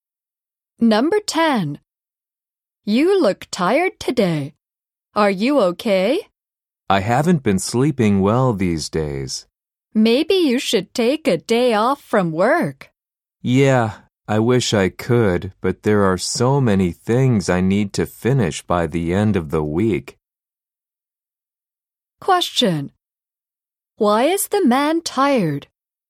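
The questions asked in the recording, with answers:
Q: Why is the man tired?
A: He hasn't been sleeping well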